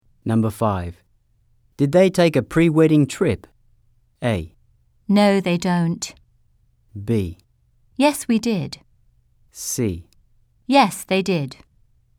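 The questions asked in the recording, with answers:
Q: Did they take a pre-wedding trip?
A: C: Yes, they did.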